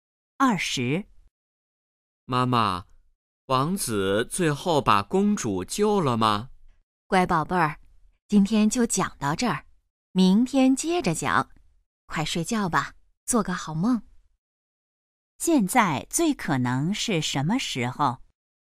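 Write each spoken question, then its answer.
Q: 现在最可能是什么时候?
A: 晚上睡觉前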